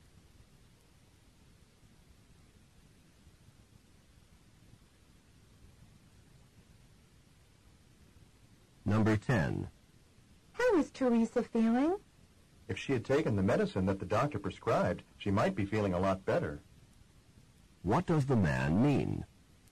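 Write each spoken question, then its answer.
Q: What does the man mean?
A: Teresa did not take her medicine and is not feeling well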